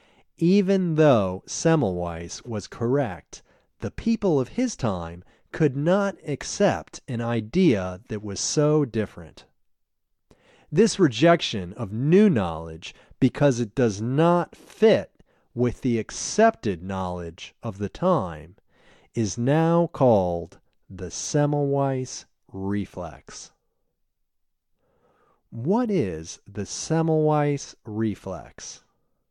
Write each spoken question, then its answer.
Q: What is the Semmelweis reflex?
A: The Semmelweis reflex is the rejection of new knowledge because it does not fit with the accepted knowledge of the time.